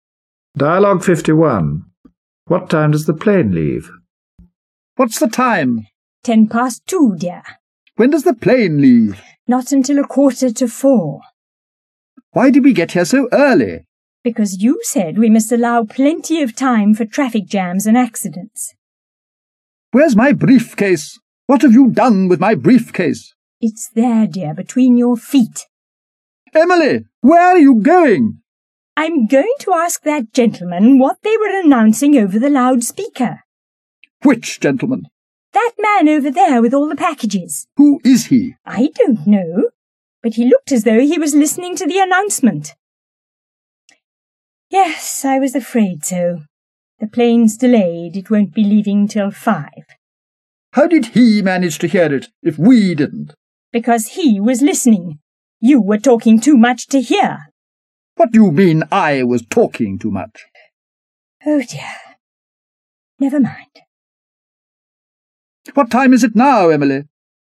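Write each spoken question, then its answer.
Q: What time does the plane leave?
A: At 5 o'clock (delayed from 3:45)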